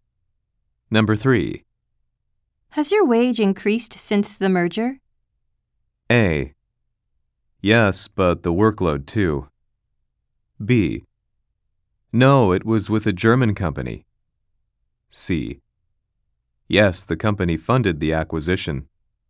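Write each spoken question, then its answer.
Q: Has your wage increased since the merger?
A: A: Yes, but the workload too.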